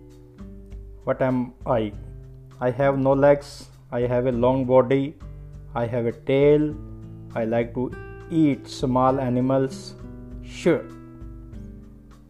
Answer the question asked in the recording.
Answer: I am snake.